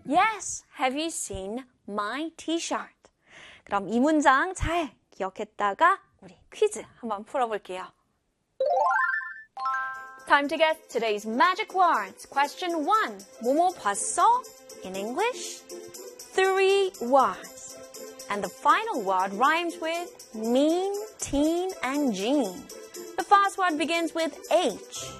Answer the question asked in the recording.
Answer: Have you seen? Have you seen?